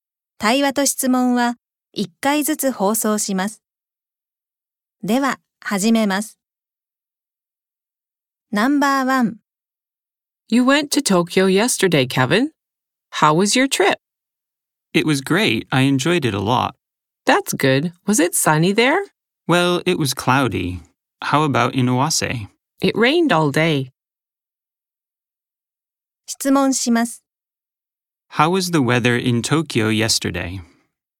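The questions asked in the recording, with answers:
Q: How was the weather in Tokyo yesterday?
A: It was cloudy.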